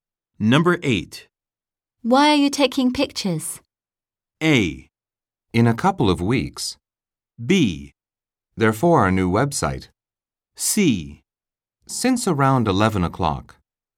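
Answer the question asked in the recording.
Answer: B: For our new website.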